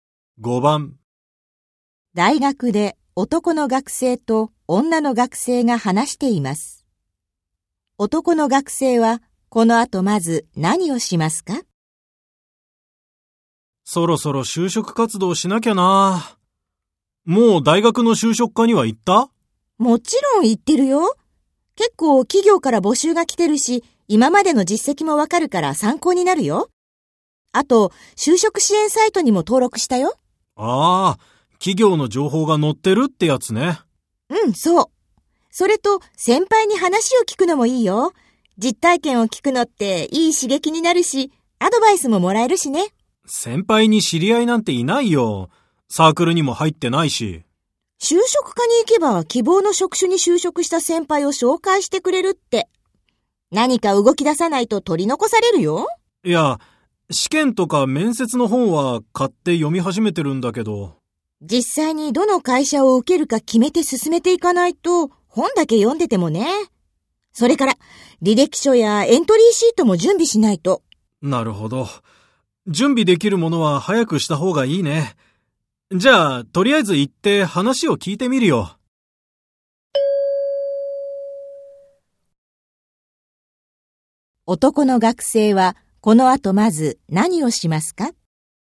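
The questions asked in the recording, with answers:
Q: 男の学生はこの後まず何をしますか?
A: 大学の就職課に行って話を聞く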